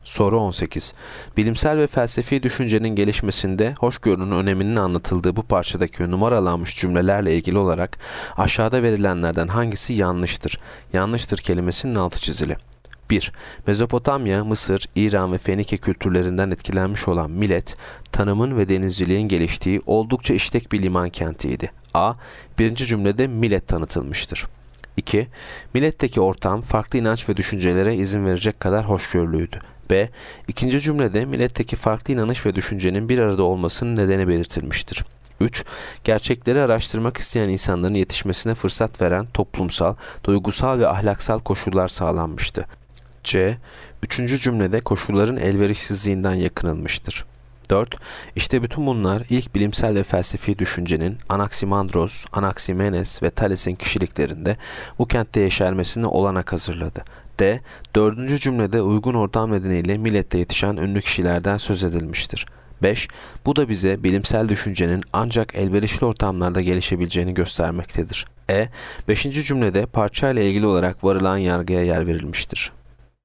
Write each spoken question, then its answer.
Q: Bilimsel ve felsefi düşüncenin gelişmesinde hoşgörünün öneminin anlatıldığı bu parçadaki numaralanmış cümlelerle ilgili olarak aşağıda verilenlerden hangisi yanlıştır?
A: Yanıt C. Üçüncü cümlede koşulların elverişsizliğinden yakınılmıştır.